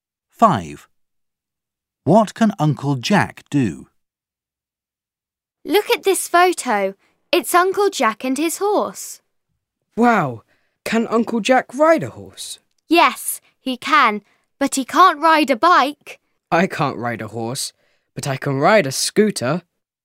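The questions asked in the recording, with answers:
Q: What can Uncle Jack do?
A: He can ride a horse.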